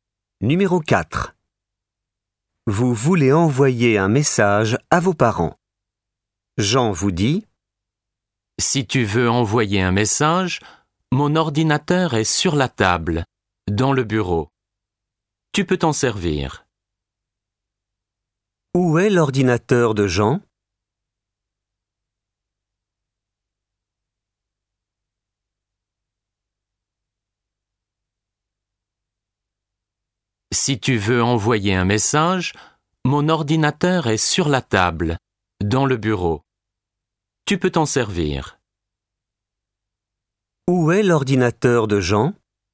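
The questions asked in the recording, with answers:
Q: Où est l'ordinateur de Jean ?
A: Sur la table, dans le bureau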